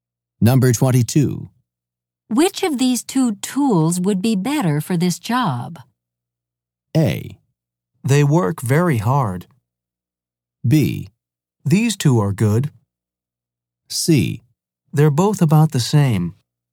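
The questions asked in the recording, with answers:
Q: Which of these two tools would be better for this job?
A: C: They're both about the same.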